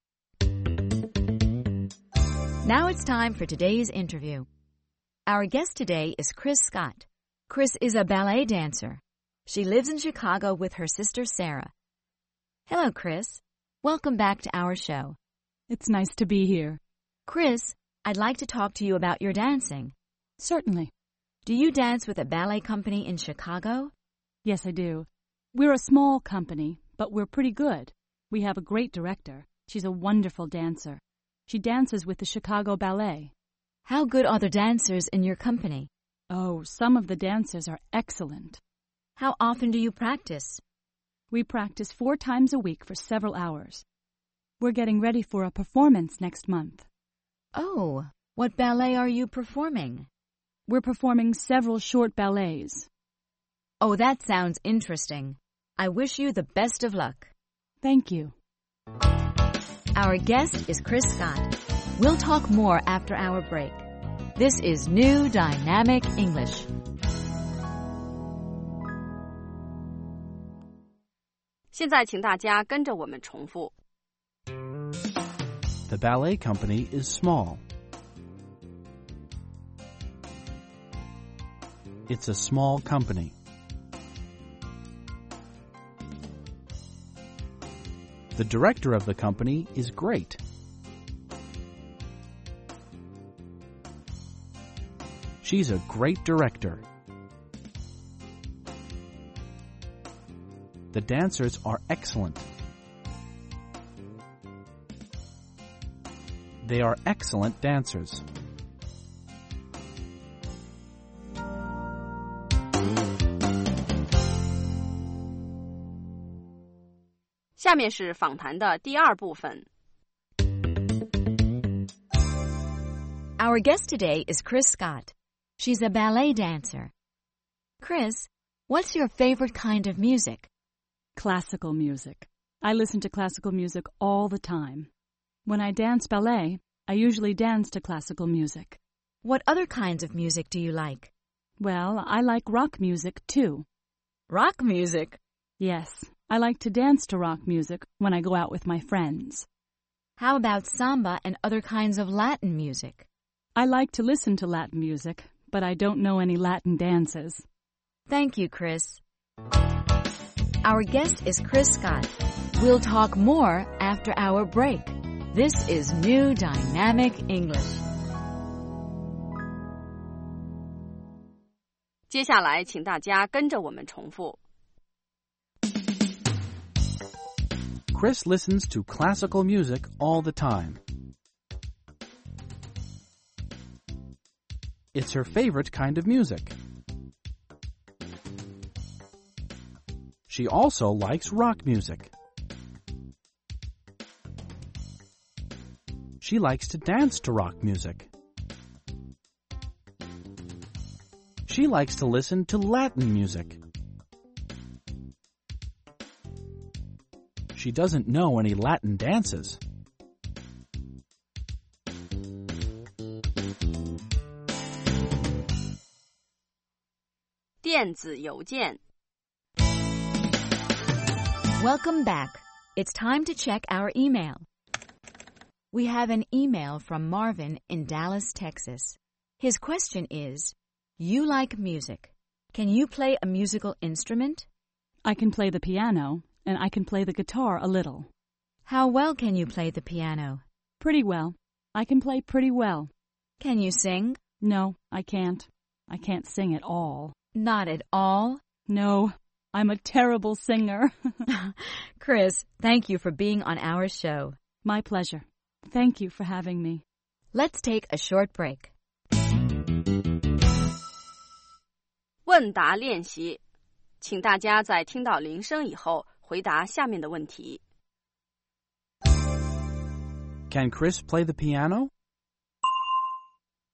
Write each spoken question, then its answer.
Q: Can Chris play the piano?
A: Yes, she can. She can play the piano pretty well.